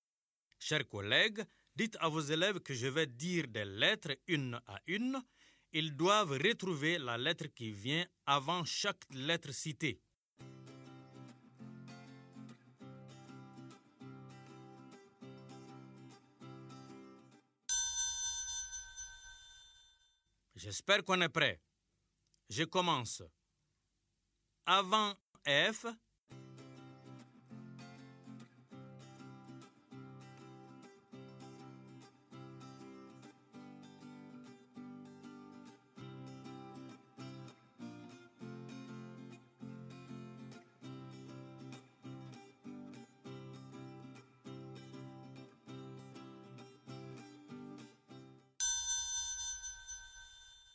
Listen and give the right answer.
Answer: Bravo les élèves, j'espère que vous avez trouvé la lettre E.